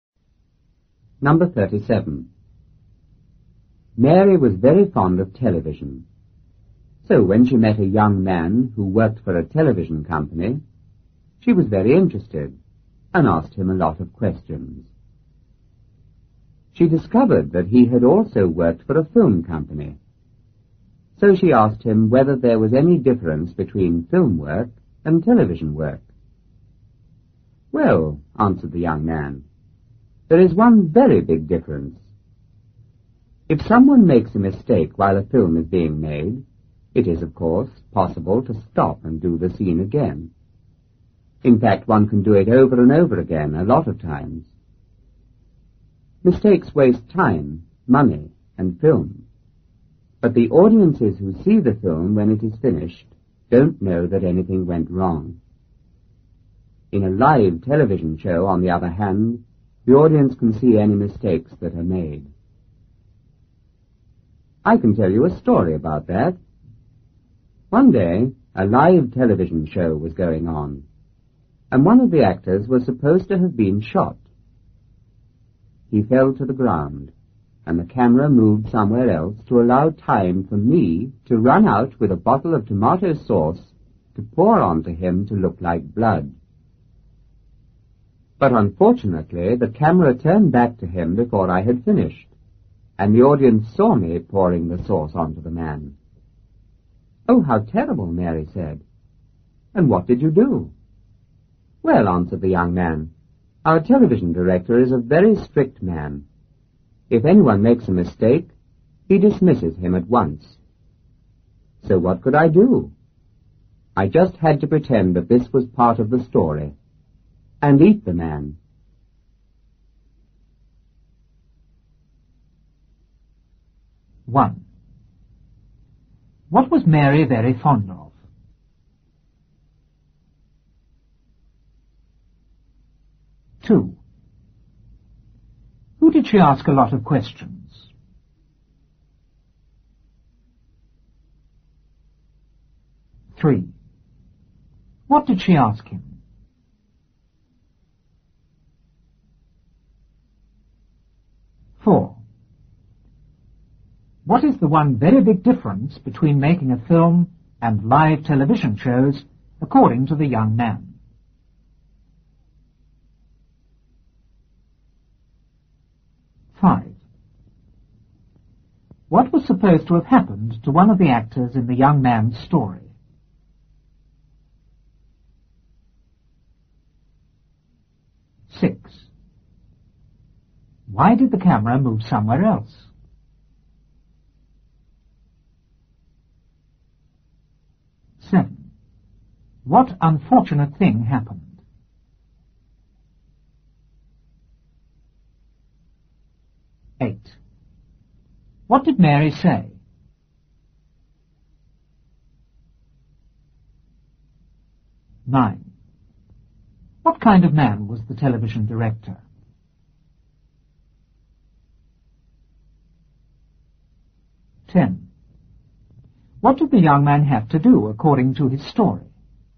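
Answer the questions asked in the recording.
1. Television
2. A young man who worked for a television company
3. Whether there was any difference between film work and television work
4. In a film mistakes can be redone unseen; in live TV the audience sees mistakes
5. He was supposed to have been shot
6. To allow time for the young man to pour tomato sauce on him to look like blood
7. The camera turned back before he finished and the audience saw him pouring the sauce
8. Oh, how terrible. And what did you do?
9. A very strict man
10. Pretend it was part of the story and eat the man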